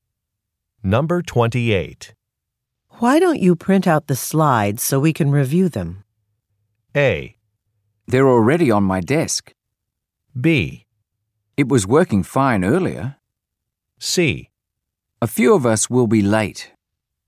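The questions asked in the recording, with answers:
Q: Why don't you print out the slides so we can review them?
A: A: They're already on my desk.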